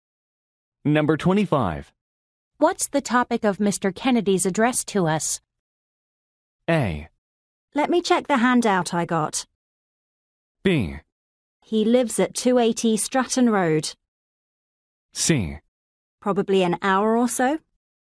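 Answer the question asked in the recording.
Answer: A: Let me check the handout I got.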